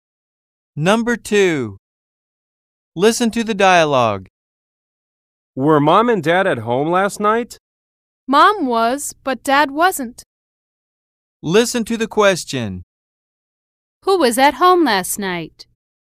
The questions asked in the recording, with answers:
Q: Who was at home last night?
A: The young woman's mother was.